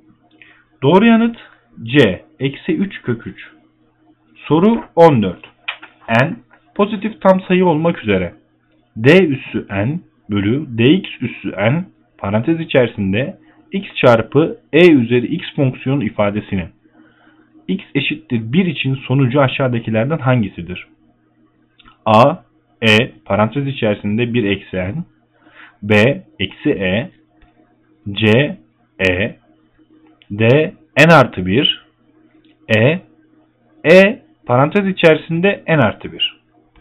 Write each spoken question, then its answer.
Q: N pozitif tam sayı olmak üzere d üssü n bölü dx üssü n parantez içerisinde x çarpı e üzeri x fonksiyonu ifadesinin x eşittir 1 için sonucu aşağıdakilerden hangisidir?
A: Doğru yanıt E. E parantez içerisinde n artı 1.